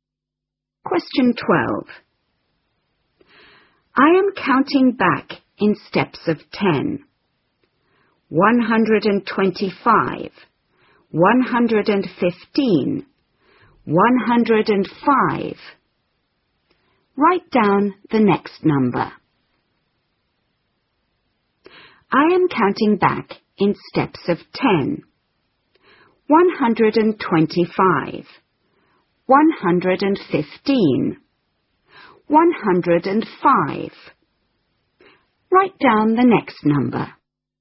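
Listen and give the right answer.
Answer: 95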